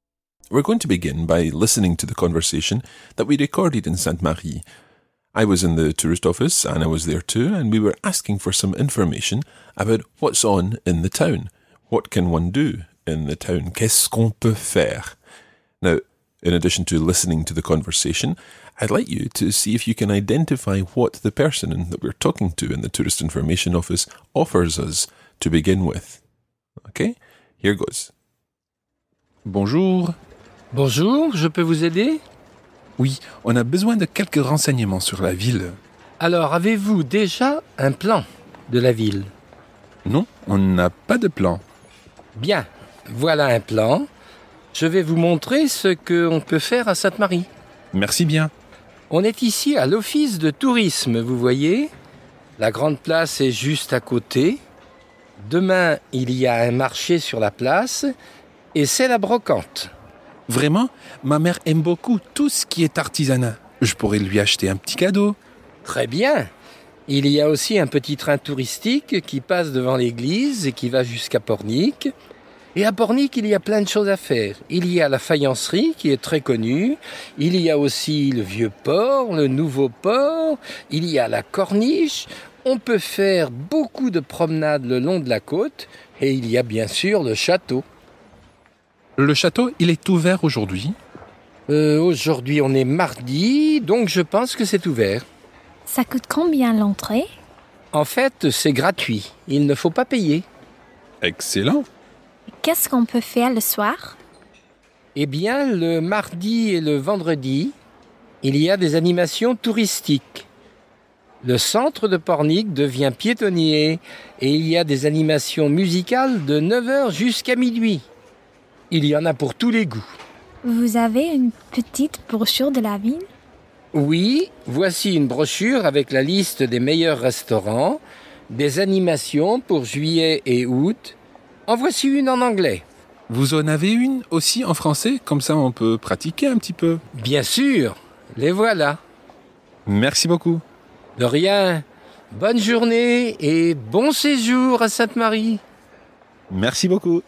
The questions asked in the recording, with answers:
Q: I'd like you to see if you can identify what the person that we're talking to in the tourist information office offers us to begin with.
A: He said, avez-vous déjà un plan de la ville?